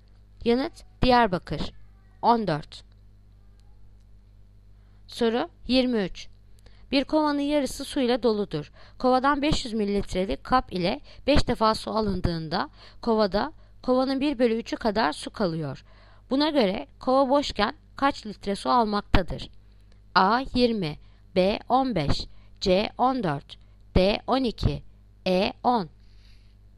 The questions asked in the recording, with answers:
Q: Buna göre kova boşken kaç litre su almaktadır?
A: Yanıt Bursa 15.